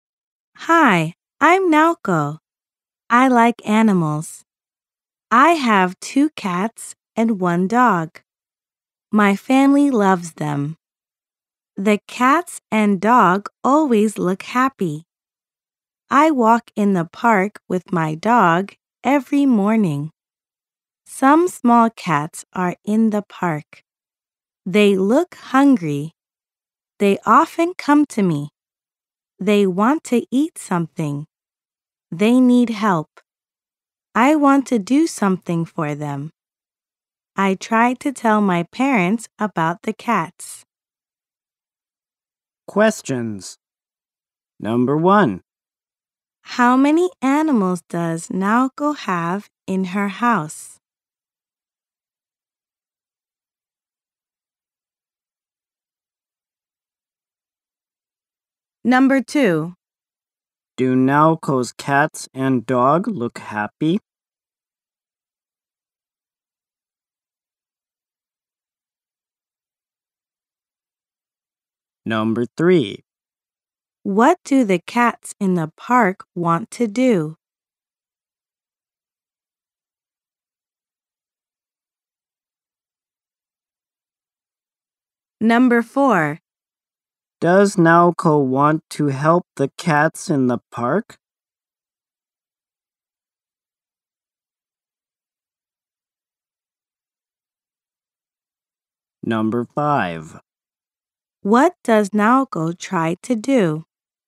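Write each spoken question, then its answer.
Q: How many animals does Naoko have in her house?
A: Three (two cats and one dog)

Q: Do Naoko's cats and dog look happy?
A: Yes, they do.

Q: What do the cats in the park want to do?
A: They want to eat something.

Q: Does Naoko want to help the cats in the park?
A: Yes, she does.

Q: What does Naoko try to do?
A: She tries to tell her parents about the cats.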